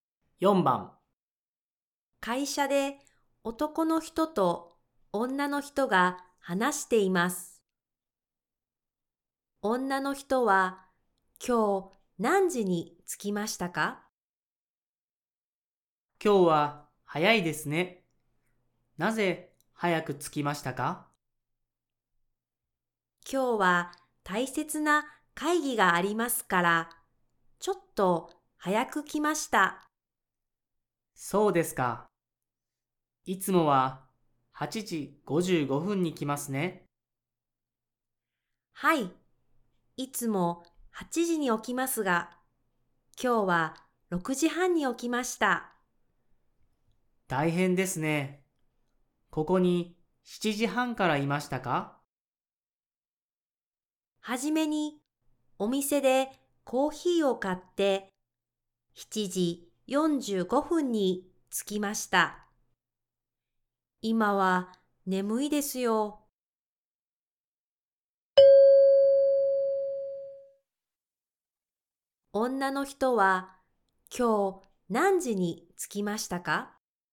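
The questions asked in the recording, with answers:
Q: 女の人は今日何時に着きましたか?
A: 7時45分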